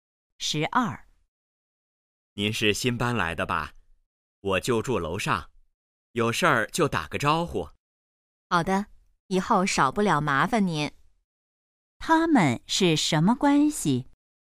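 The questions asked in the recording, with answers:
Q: 他们是什么关系?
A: 邻居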